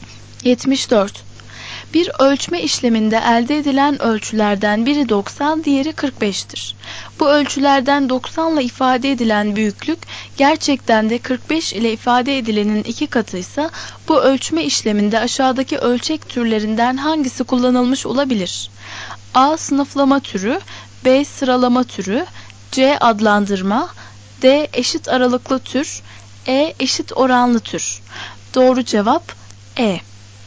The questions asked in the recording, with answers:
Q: Bu ölçülerden 90 ile ifade edilen büyüklük, gerçekten de 45 ile ifade edilenin iki katıysa, bu ölçme işleminde aşağıdaki ölçek türlerinden hangisi kullanılmış olabilir?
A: Doğru cevap E.